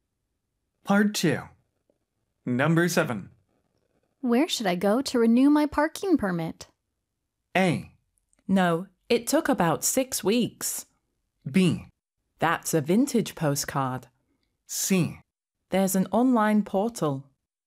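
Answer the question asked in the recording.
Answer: C: There's an online portal.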